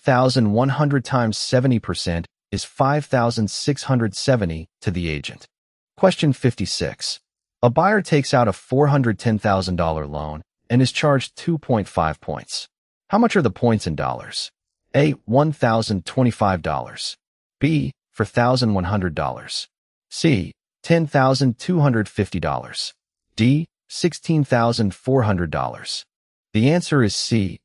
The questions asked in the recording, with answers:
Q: How much are the points in dollars?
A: The answer is C.